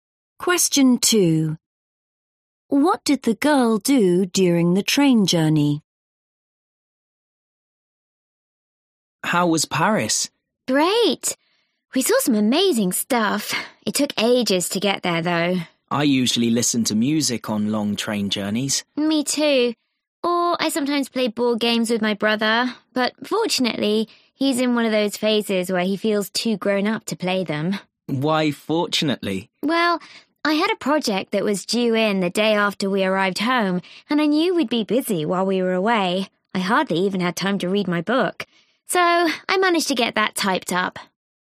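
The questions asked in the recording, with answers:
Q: What did the girl do during the train journey?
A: She typed up her project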